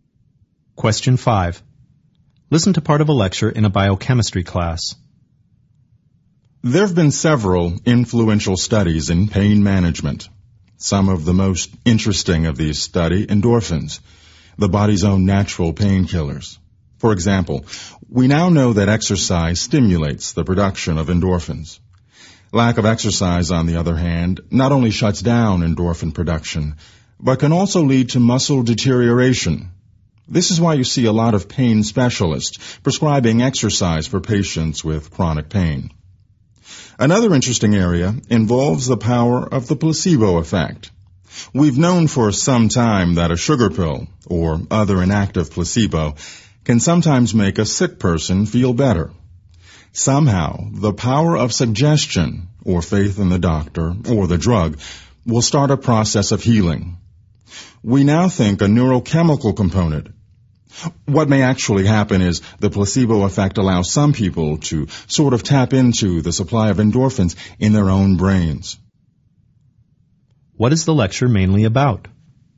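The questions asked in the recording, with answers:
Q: What is the lecture mainly about?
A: Studies of endorphins in pain management (exercise and the placebo effect)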